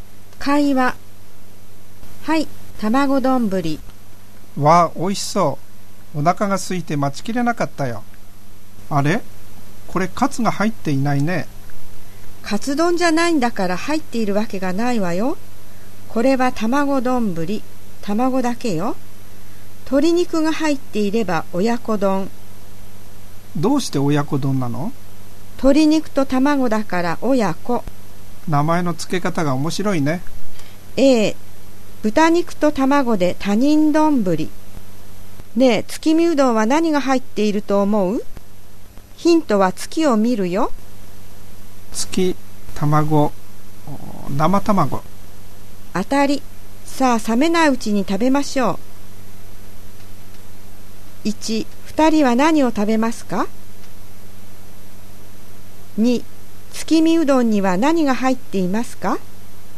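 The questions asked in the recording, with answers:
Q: 2人は何を食べますか?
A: 卵丼ぶり

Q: 月見うどんには何が入っていますか?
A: 生卵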